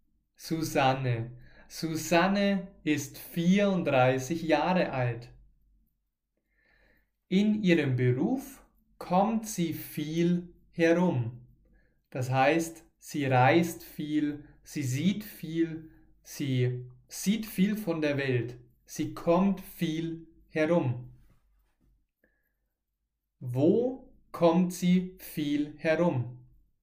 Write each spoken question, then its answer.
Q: Wo kommt sie viel herum?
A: in ihrem Beruf. Sie kommt in ihrem Beruf viel herum.